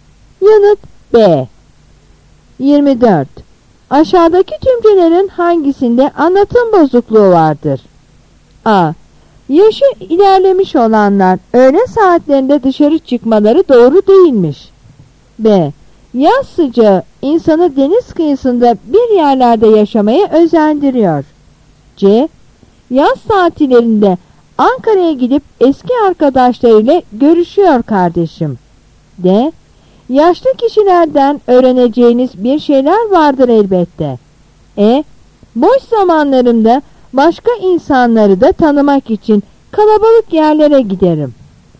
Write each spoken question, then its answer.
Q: Aşağıdaki cümlelerin hangisinde anlatım bozukluğu vardır?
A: Yanıt A.